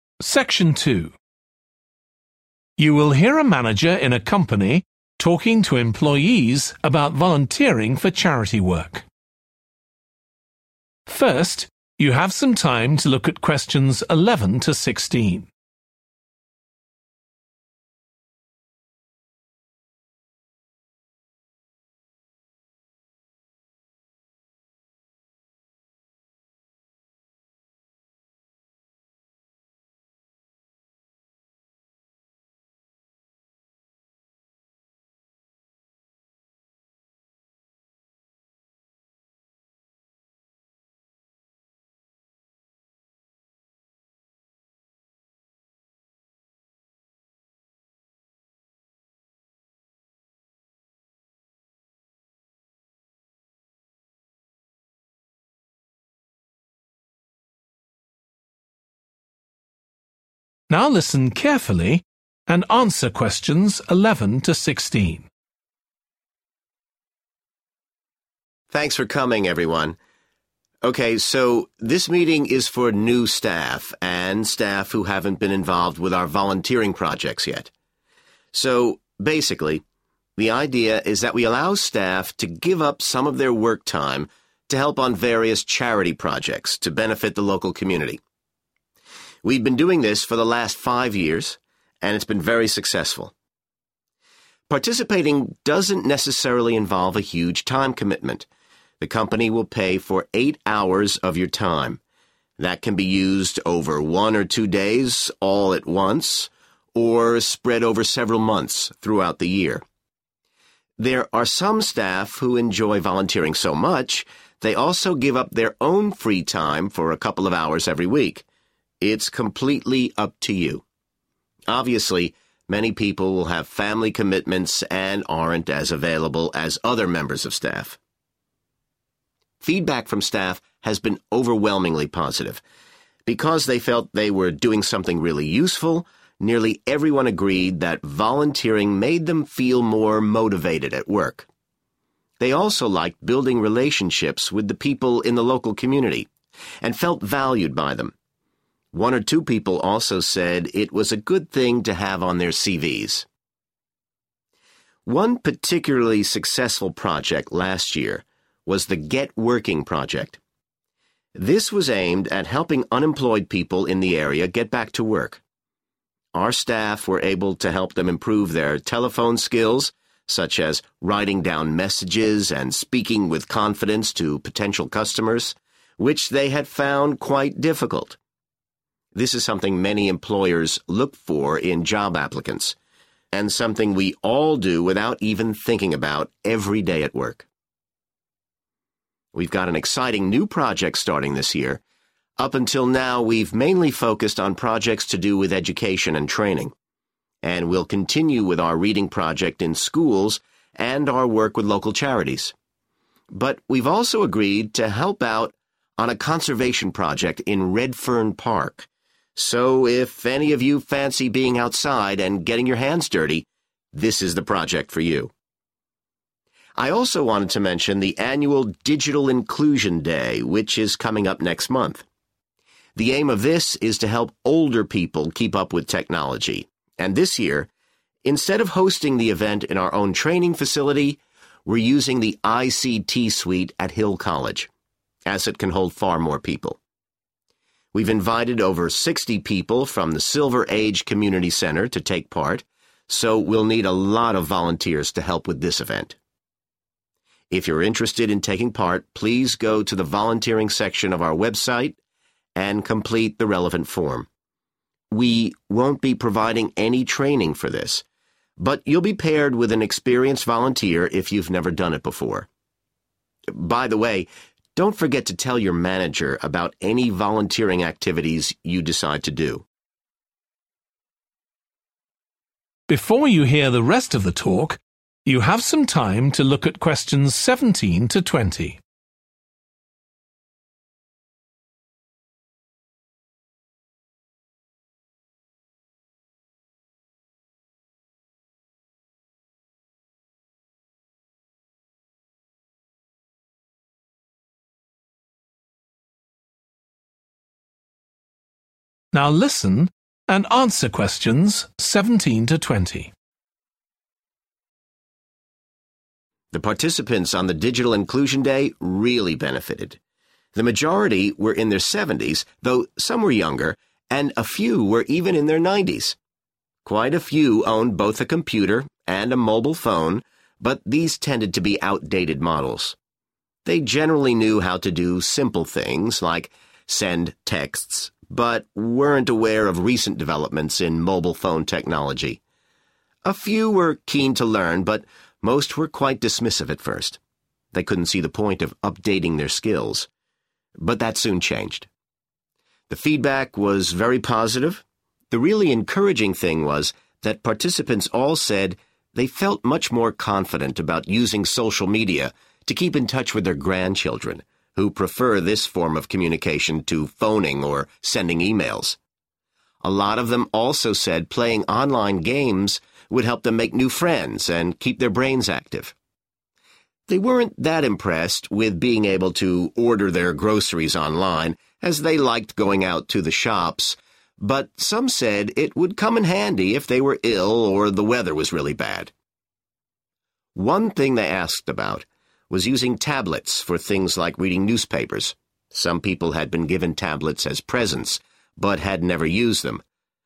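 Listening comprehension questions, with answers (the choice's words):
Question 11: How much time for volunteering does the company allow per employee?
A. two hours per week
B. one day per month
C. 8 hours per year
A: 8 hours per year

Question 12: In feedback almost all employees said that volunteering improved their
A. chances of promotion.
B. job satisfaction.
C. relationships with colleagues.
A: job satisfaction.

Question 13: Last year some staff helped unemployed people with their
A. literacy skills.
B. job applications.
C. communication skills.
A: communication skills.

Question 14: This year the company will start a new volunteering project with a local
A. school.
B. park.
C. charity.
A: park.

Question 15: Where will the Digital Inclusion Day be held?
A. at the company's training facility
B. at a college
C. in a community centre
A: at a college

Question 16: What should staff do if they want to take part in the Digital Inclusion Day?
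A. fill in a form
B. attend a training workshop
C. get permission from their manager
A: fill in a form

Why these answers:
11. The company will pay for eight hours of your time. That can be used over one or two days all at once, or spread over several months throughout the year. [Công ty sẽ trả tiền cho tám tiếng thời gian của bạn. Phần thời gian này có thể được sử dụng một lần trong một – hai ngày hoặc trải dài trong vài tháng trong suốt cả năm.] There are some staff who enjoy volunteering so much they also give up their own free time
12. Feedback from staff has been overwhelmingly positive. Because they felt they were doing something really useful, nearly everyone agreed that volunteering made them feel more motivated at work [hầu hết mọi người đều đồng ý rằng hoạt động tình nguyện khiến họ cảm thấy có động lực hơn trong công việc]
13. One particularly successful project last year was the Get Working Project. 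This was aimed at helping unemployed people in the area get back to work. Our staff were able to help them improve their telephone skills, such as writing down messages and speaking with confidence to potential customers [Nhân viên của chúng tôi đã giúp họ cải thiện kỹ năng dùng điện thoại, chẳng hạn như viết tin nhắn và nói chuyện một cách tự tin với khách hàng tiềm năng].
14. And we'll continue with out reading project in schools and our work with local charities. But we're also agreed to help out on a conservation project in Redfern Park [Nhưng chúng tôi cũng đồng ý giúp đỡ trong một dự án bảo tồn ở công việc Redfern]
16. If you're interested in taking part, please go to the volunteering section of our website and complete the relevant form [Nếu bạn muốn tham gia, vui lòng truy cập mục tình nguyện trên trang web của chúng tôi và hoàn thành biểu mẫu có liên quan]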